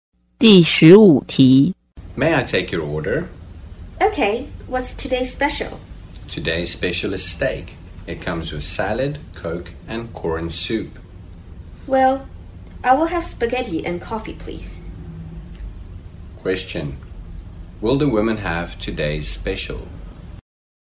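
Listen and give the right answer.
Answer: No, she will have spaghetti and coffee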